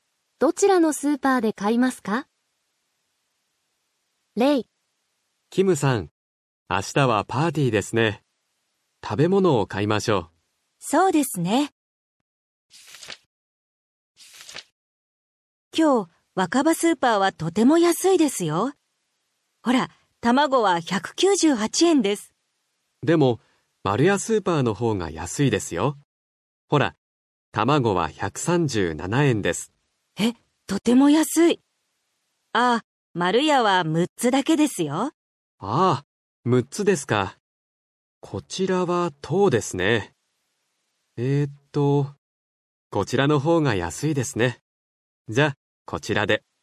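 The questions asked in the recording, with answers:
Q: どちらのスーパーで買いますか?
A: 若葉スーパー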